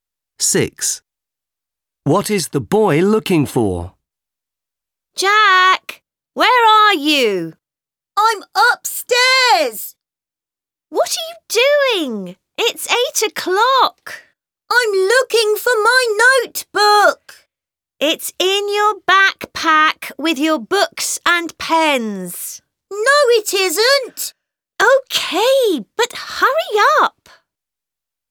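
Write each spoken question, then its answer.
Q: What is the boy looking for?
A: His notebook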